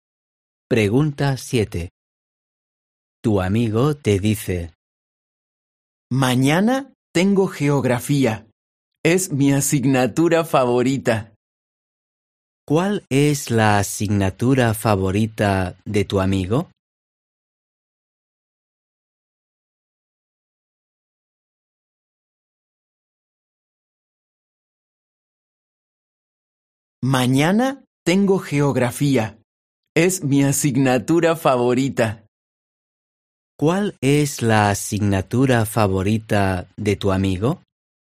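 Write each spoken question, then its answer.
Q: ¿Cuál es la asignatura favorita de tu amigo?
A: geografía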